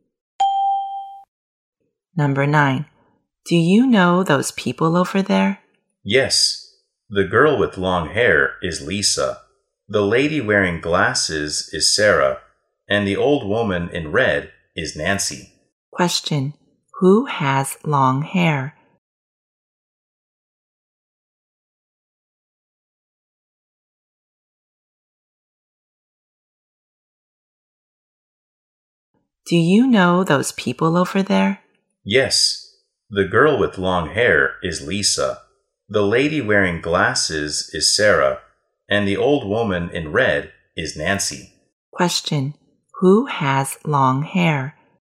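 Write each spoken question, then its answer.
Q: Who has long hair?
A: Lisa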